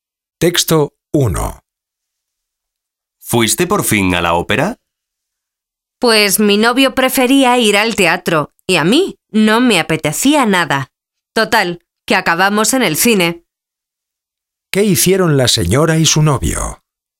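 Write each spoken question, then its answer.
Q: ¿Qué hicieron la señora y su novio?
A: Fueron al cine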